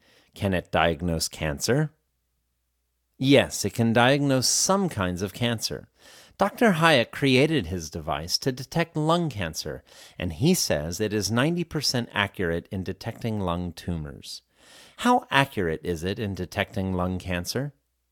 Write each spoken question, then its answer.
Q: How accurate is it in detecting lung cancer?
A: It is 90% accurate in detecting lung cancer.